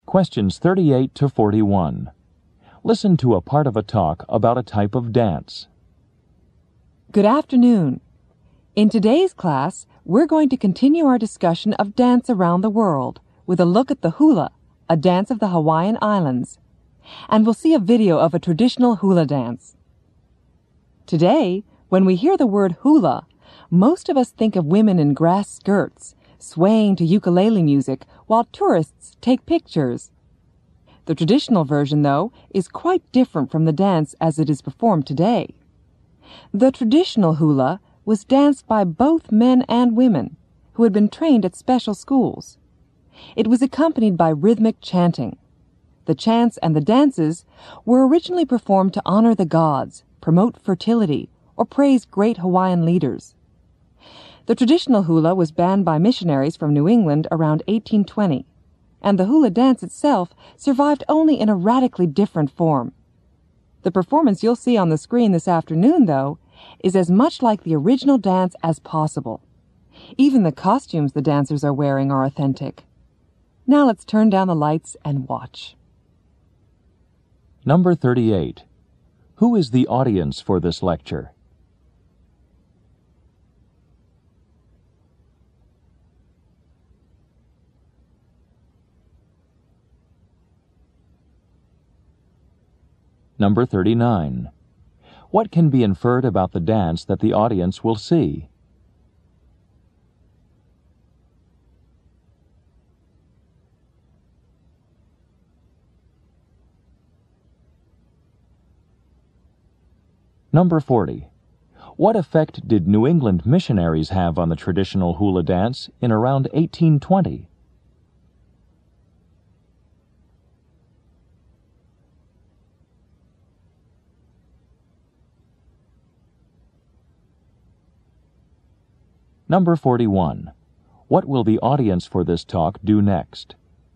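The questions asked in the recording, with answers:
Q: Who is the audience for this lecture?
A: Students in a class on dance around the world

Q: What can be inferred about the dance that the audience will see?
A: It is as much like the original traditional hula as possible, with authentic costumes

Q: What effect did New England missionaries have on the traditional hula dance in around 1820?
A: They banned it

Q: What will the audience for this talk do next?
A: Watch a video of a traditional hula dance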